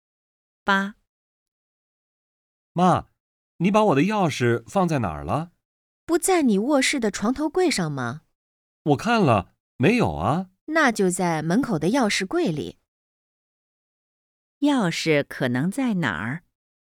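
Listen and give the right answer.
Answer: 门口的钥匙柜里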